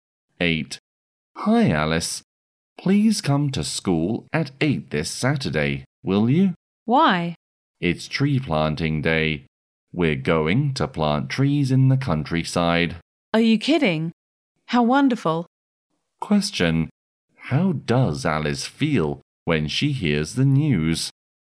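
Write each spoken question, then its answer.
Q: How does Alice feel when she hears the news?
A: Excited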